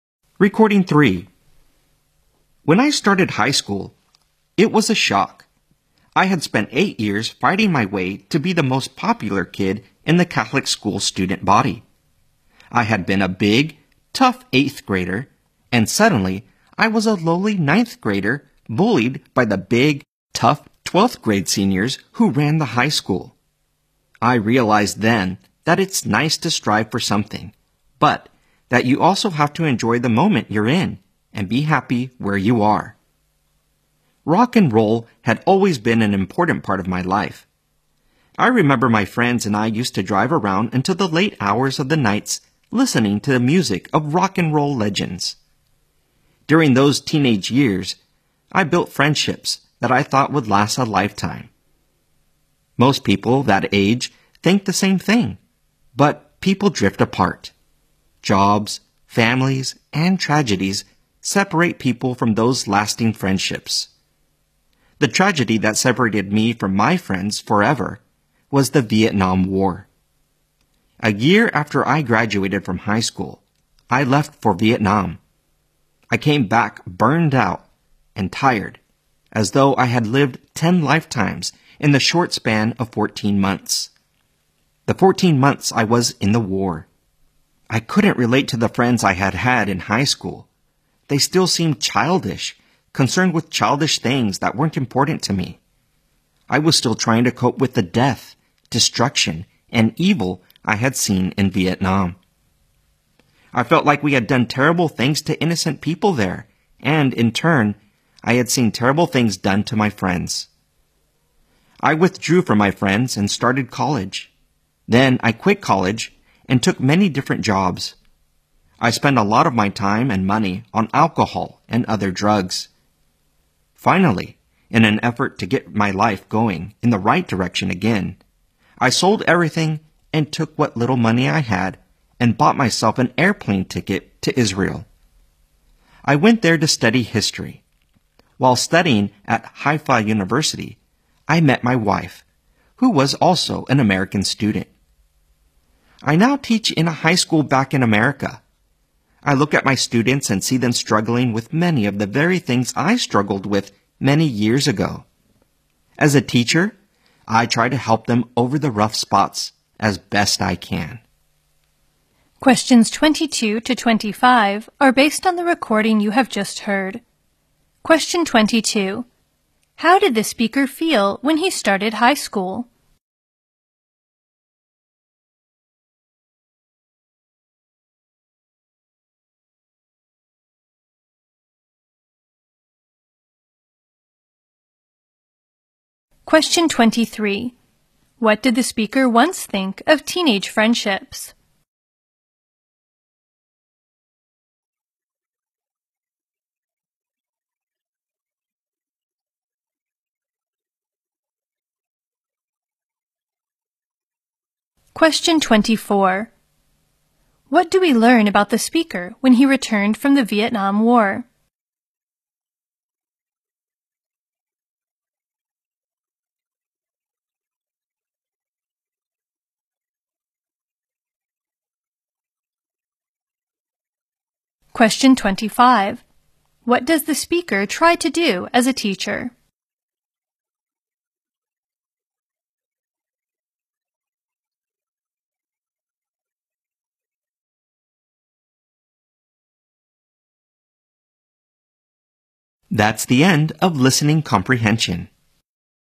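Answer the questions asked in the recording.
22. Shocked
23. That they would last a lifetime
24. He was burned out and couldn't relate to his high school friends
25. Help students over the rough spots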